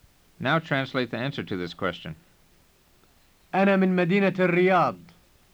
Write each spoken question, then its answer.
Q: Now translate the answer to this question.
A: It means I'm from the city of Riyadh.